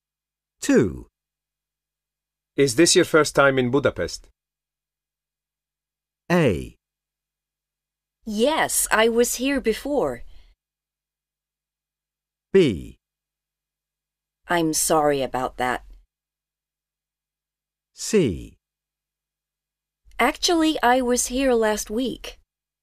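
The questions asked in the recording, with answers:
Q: Is this your first time in Budapest?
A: C: Actually, I was here last week.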